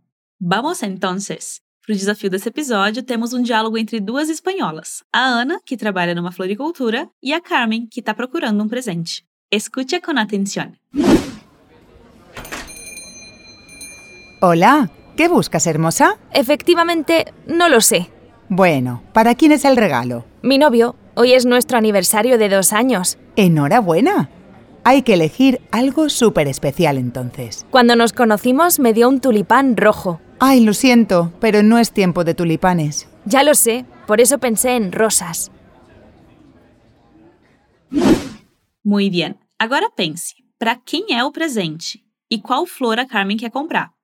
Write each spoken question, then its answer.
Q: para quién es el presente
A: Mi novio.

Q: ¿Y e cuál flor a Carmen quiere comprar.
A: Rosas.